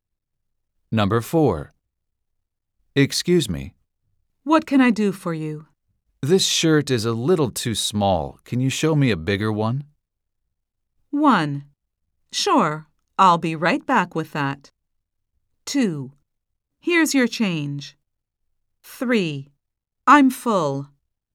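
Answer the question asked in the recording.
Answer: 1: Sure, I'll be right back with that.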